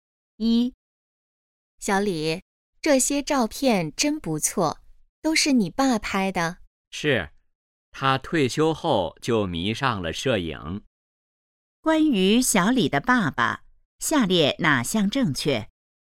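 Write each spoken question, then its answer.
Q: 关于小李的爸爸,下列哪项正确?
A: 他退休后迷上了摄影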